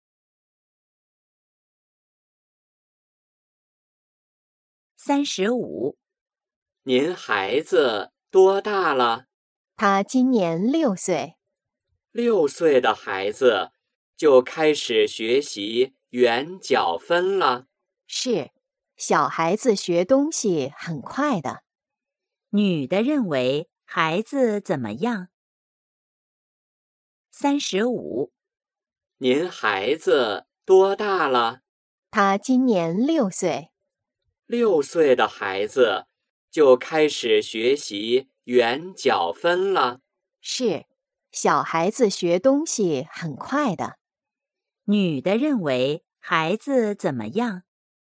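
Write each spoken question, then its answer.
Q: 女的认为孩子怎么样?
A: 学东西很快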